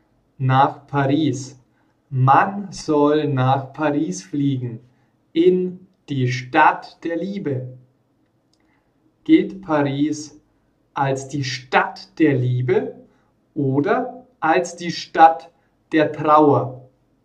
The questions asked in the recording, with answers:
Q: Gilt Paris als die Stadt der Liebe oder als die Stadt der Trauer?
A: Als die Stadt der Liebe. Paris gilt als die Stadt der Liebe.